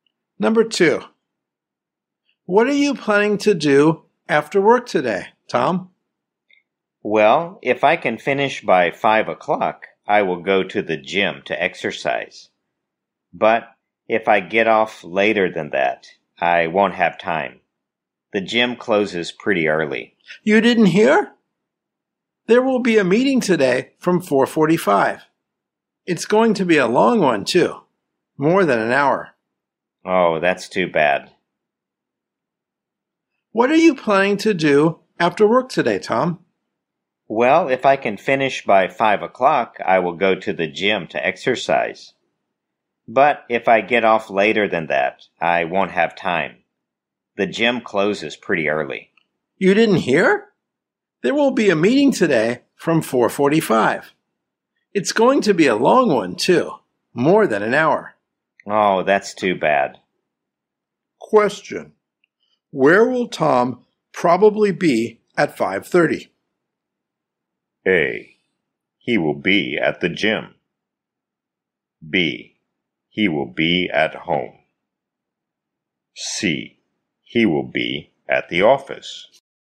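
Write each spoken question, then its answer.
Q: Where will Tom probably be at 5:30?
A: C: He will be at the office.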